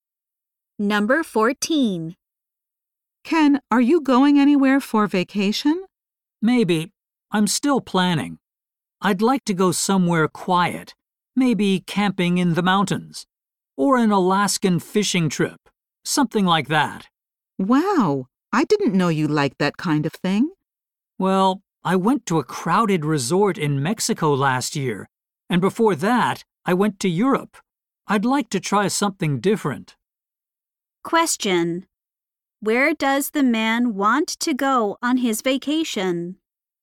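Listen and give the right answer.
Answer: Somewhere quiet, like camping in the mountains or fishing in Alaska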